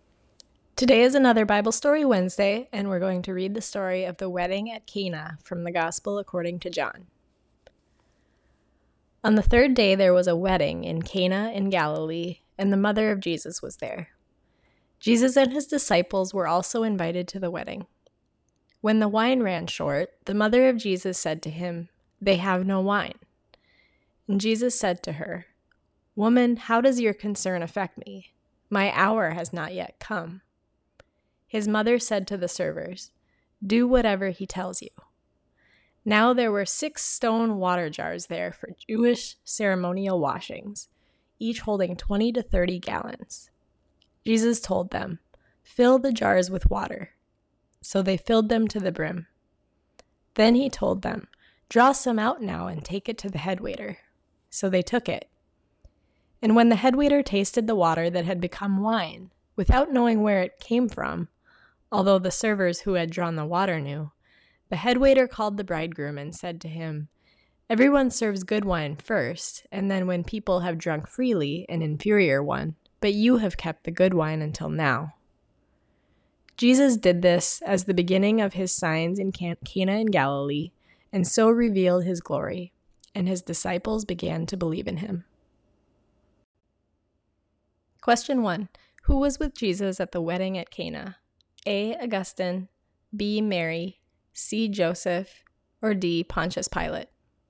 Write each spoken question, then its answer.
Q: Who was with Jesus at the wedding at Cana?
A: The answer is B. Mary was with him at the wedding and told him when the wine had run out.